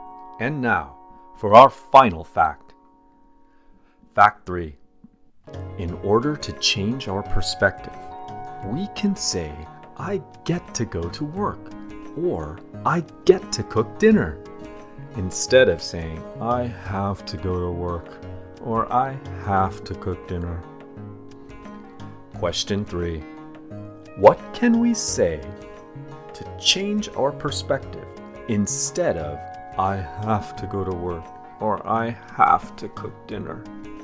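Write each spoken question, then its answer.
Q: What can we say to change our perspective instead of, I have to go to work, or I have to cook dinner?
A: I get to go to work, or I get to cook dinner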